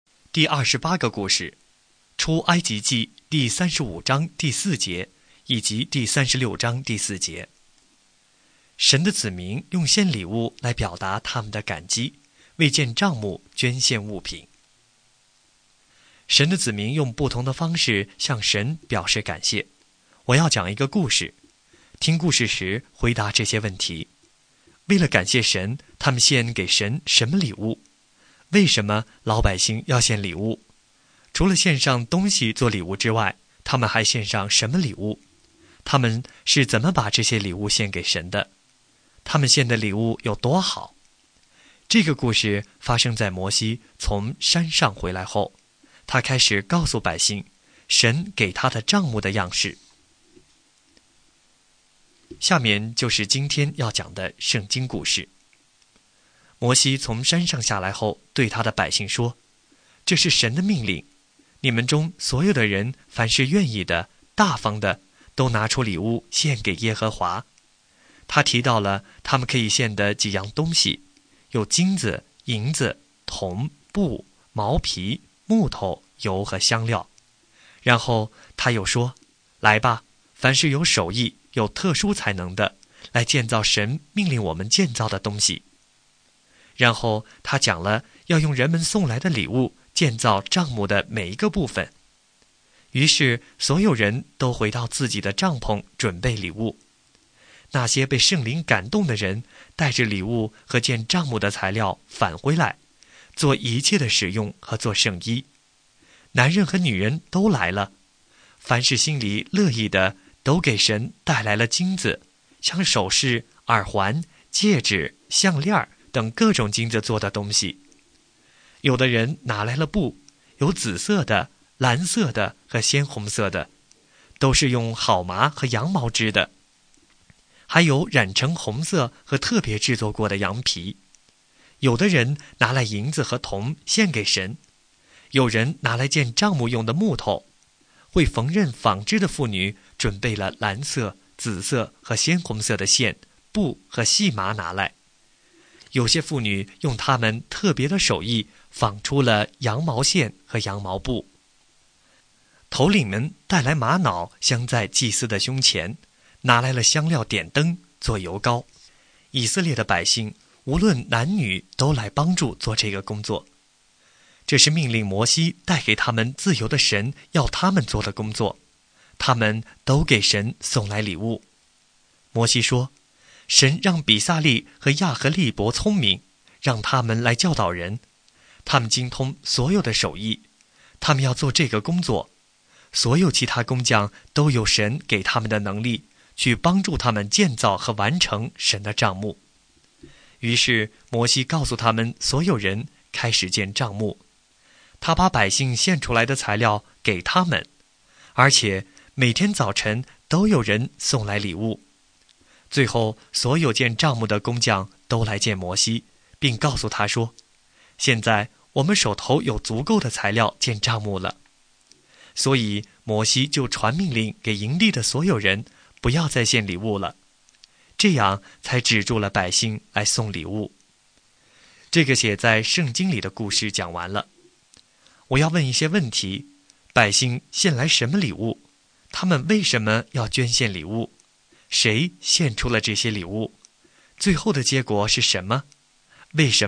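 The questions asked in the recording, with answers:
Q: 百姓献来什么礼物?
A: 金子、银子、铜、布、毛皮、木头、油、香料和宝石等建帐幕的材料

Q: 他们为什么要捐献礼物?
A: 为了感谢神,并按神的命令建造帐幕

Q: 谁献出了这些礼物?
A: 心里乐意的以色列百姓,无论男女,还有头领们

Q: 最后的结果是什么?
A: 材料多到足够建帐幕,摩西只好下令不要再献礼物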